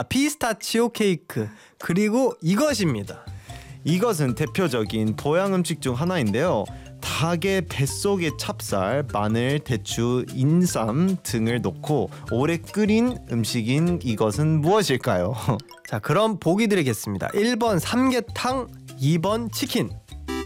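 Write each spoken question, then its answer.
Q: 닭의 뱃속에 찹쌀, 마늘, 대추, 인삼 등을 넣고 오래 끓인 음식인 이것은 무엇일까요?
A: 1: 삼계탕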